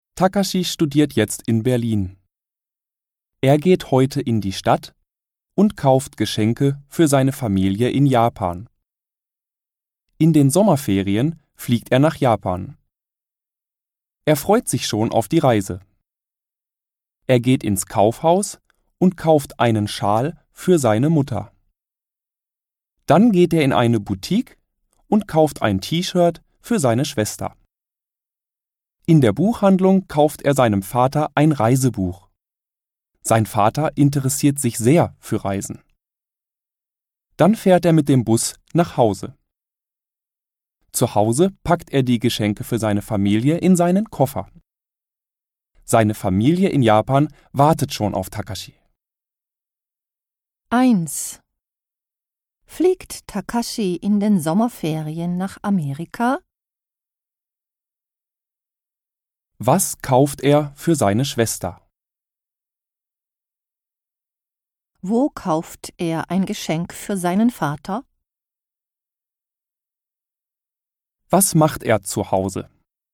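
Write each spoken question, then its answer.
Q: Fliegt Takashi in den Sommerferien nach Amerika?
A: Nein, er fliegt nach Japan.

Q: Was kauft er für seine Schwester?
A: Ein T-Shirt.

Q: Wo kauft er ein Geschenk für seinen Vater?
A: In der Buchhandlung.

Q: Was macht er zu Hause?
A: Er packt die Geschenke in seinen Koffer.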